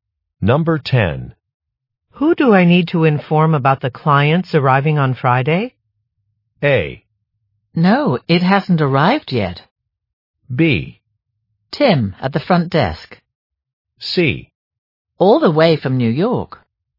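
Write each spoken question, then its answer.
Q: Who do I need to inform about the clients arriving on Friday?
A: B: Tim, at the front desk.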